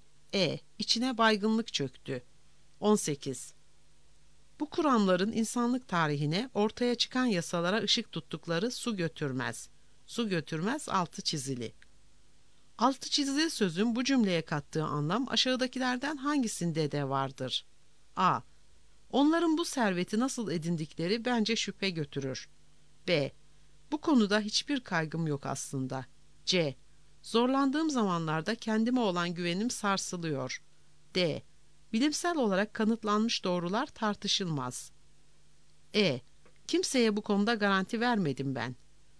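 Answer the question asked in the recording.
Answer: D: Bilimsel olarak kanıtlanmış doğrular tartışılmaz.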